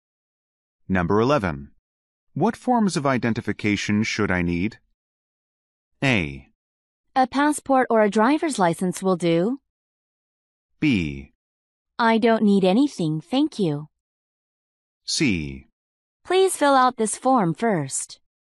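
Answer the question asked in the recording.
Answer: A: A passport or a driver's license will do.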